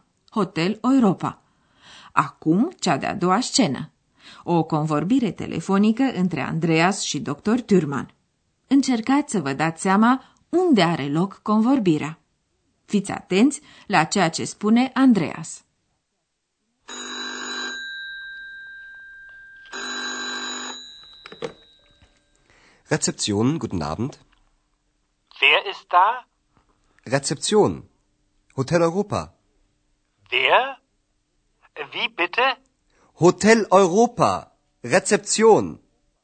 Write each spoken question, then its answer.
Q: Încercați să vă dați seama unde are loc convorbirea.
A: Hotelul Europa îl cunoașteți deja, iar Andreas cheamă recepția.